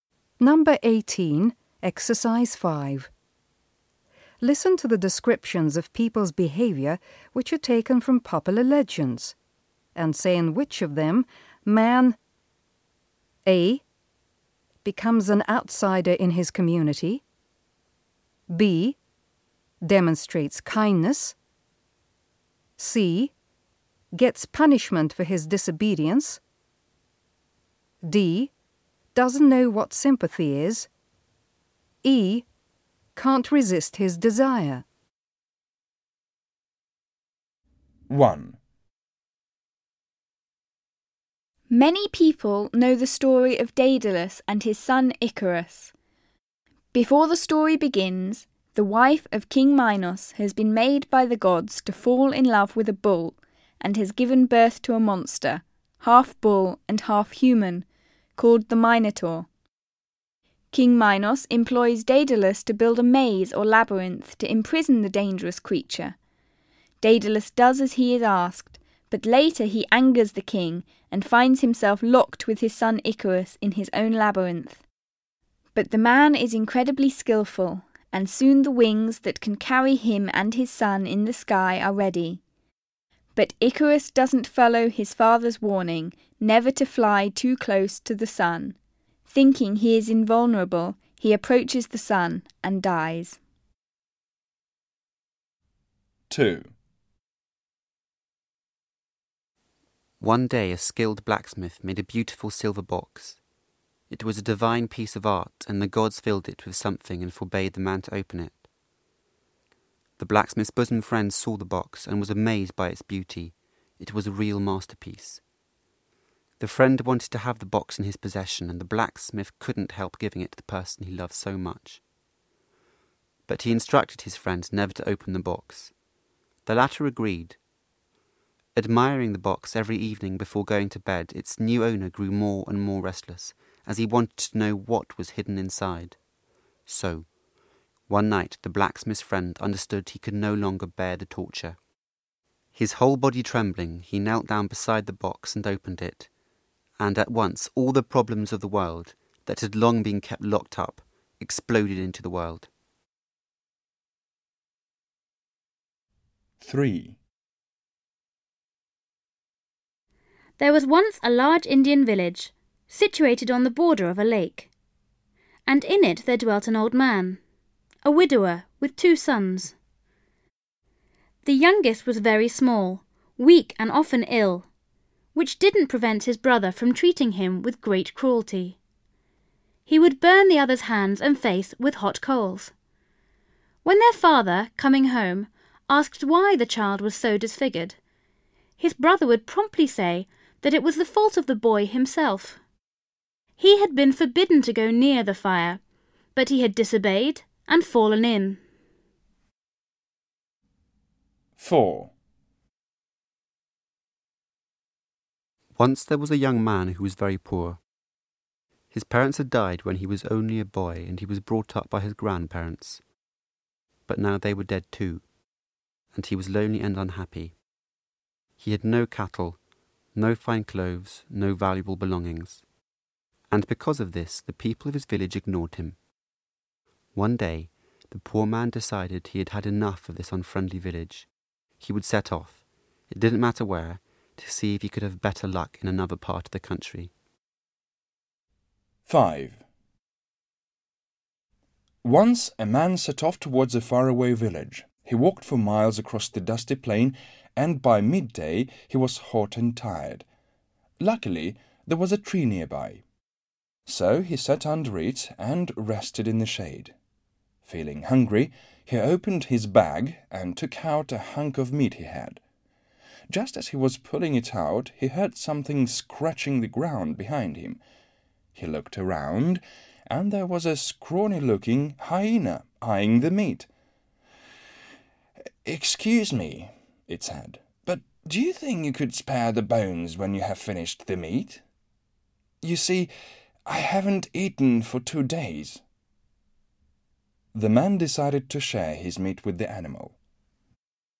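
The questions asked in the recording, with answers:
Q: Many people know the story of Daedalus and his son Icarus.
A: C: gets punishment for his disobedience

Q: One day a skilled blacksmith made a beautiful silver box.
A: E: can't resist his desire

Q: There was once a large Indian village, situated on the border of a lake.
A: D: doesn't know what sympathy is

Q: Once there was a young man who was very poor.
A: A: becomes an outsider in his community

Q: Once a man set off towards a faraway village.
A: B: demonstrates kindness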